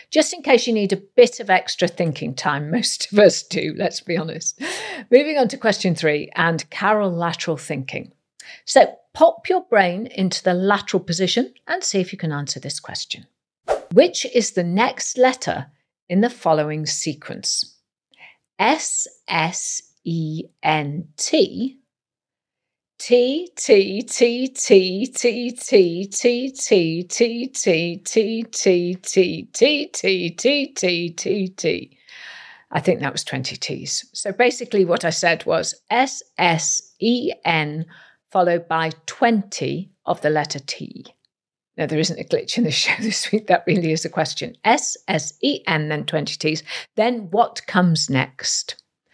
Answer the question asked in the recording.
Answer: And the answer is F.